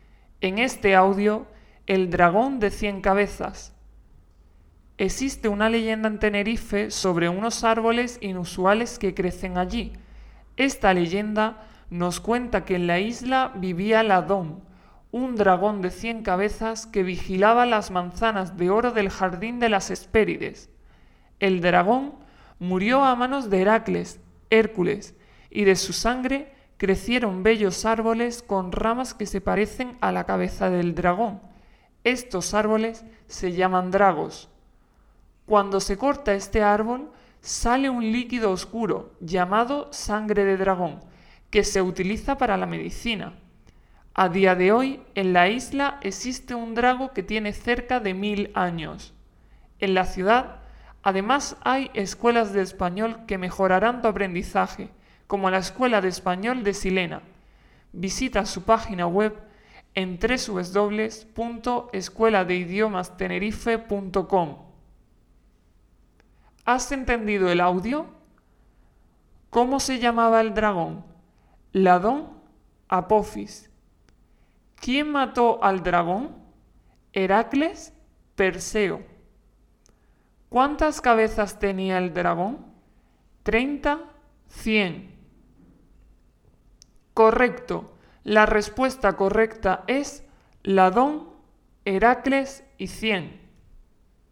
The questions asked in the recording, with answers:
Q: ¿Cómo se llamaba el dragón?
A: Ladón

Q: ¿Quién mató al dragón?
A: Heracles

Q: ¿Cuántas cabezas tenía el dragón?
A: cien